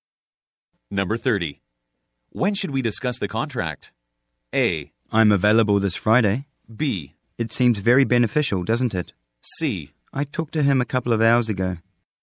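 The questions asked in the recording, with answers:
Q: When should we discuss the contract?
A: A: I'm available this Friday.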